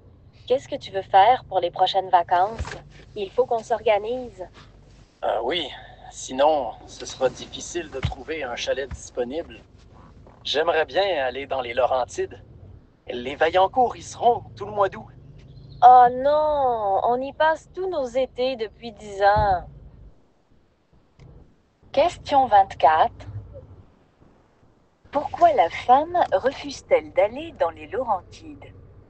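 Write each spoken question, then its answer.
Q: Pourquoi la femme refuse-t-elle d'aller dans les Laurentides?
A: Parce qu'ils y passent tous leurs étés depuis 10 ans.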